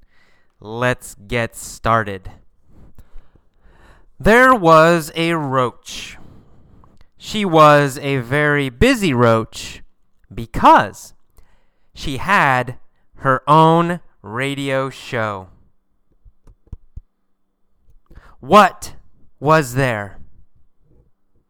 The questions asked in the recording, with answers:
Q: What was there?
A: There was a roach.